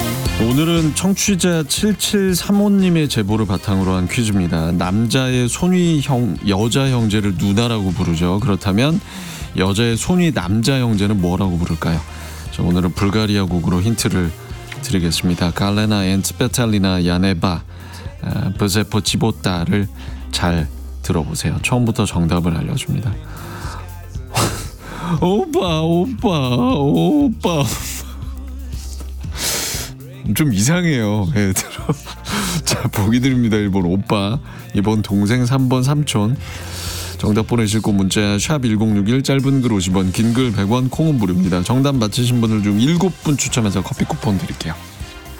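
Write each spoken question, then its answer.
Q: 그렇다면 여자의 손위 남자 형제는 뭐라고 부를까요?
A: 1: 오빠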